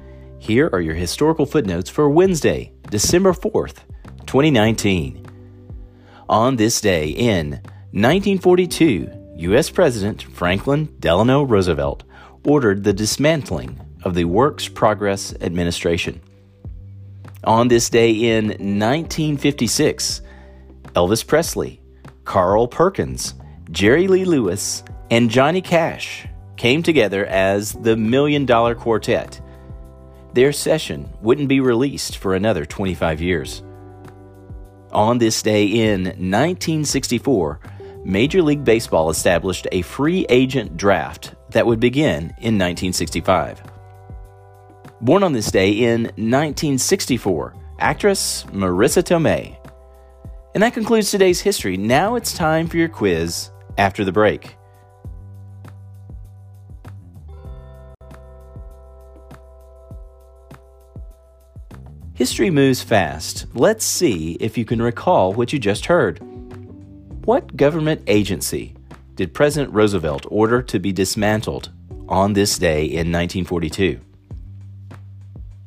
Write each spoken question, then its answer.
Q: What government agency did President Roosevelt order to be dismantled on this day in 1942?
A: Answer, the Works Progress Administration.